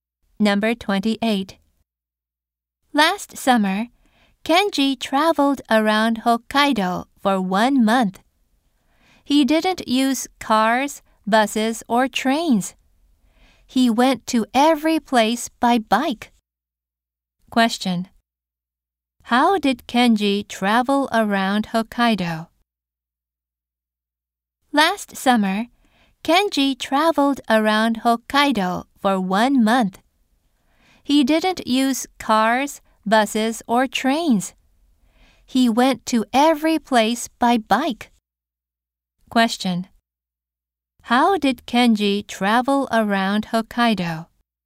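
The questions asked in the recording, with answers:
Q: How did Kenji travel around Hokkaido?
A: By bike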